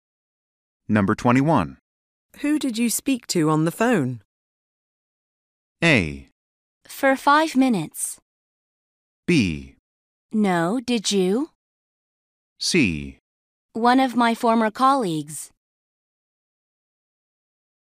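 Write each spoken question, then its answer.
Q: Who did you speak to on the phone?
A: C: One of my former colleagues.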